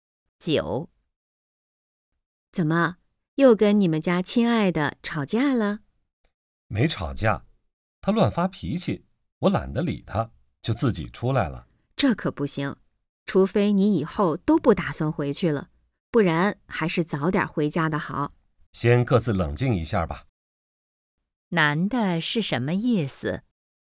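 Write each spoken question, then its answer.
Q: 男的是什么意思?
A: 劝女的早点回家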